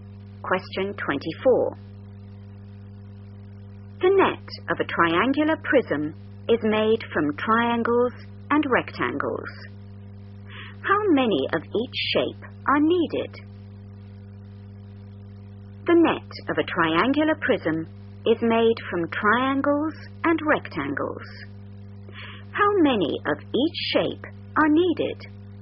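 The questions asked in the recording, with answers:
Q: How many of each shape are needed?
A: 2 triangles and 3 rectangles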